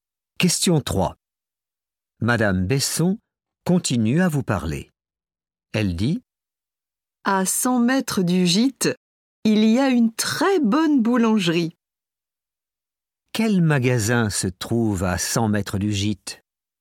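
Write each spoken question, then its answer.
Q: Quel magasin se trouve à 100 mètres du gîte?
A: une boulangerie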